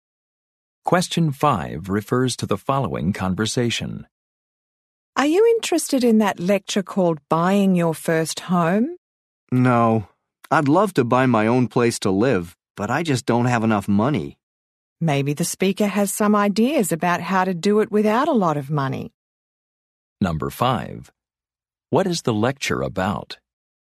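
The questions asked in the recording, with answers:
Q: What is the lecture about?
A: Buying your first home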